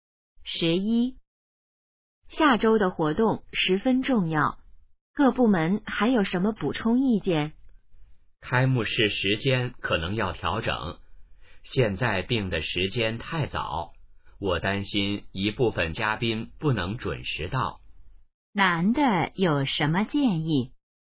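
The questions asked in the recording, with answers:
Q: 男的有什么建议?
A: 调整开幕式时间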